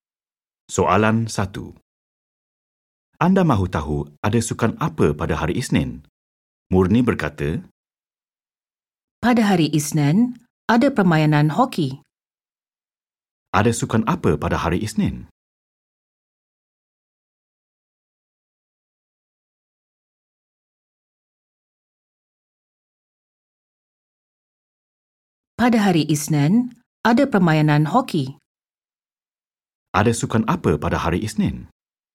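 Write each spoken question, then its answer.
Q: Ada sukan apa pada hari Isnin?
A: hoki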